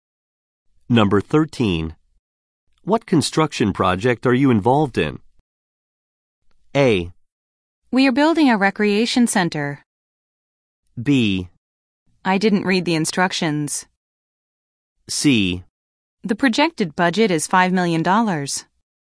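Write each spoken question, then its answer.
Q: What construction project are you involved in?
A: A: We are building a recreation center.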